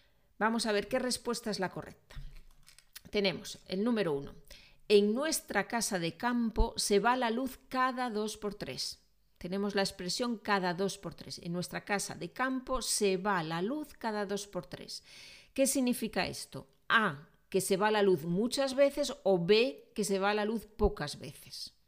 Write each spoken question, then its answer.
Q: ¿Qué significa esto? A, que se va la luz muchas veces o B, que se va la luz pocas veces.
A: a, ¿no? muchas veces, cada dos por tres, significa con mucha frecuencia, algo que se repite cada poco tiempo.